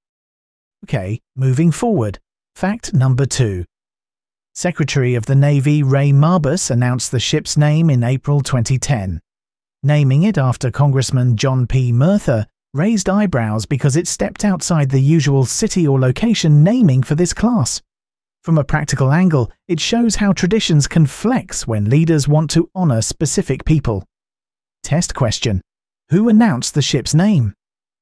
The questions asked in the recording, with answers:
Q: Who announced the ship's name?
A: Correct answer. Ray Mabus.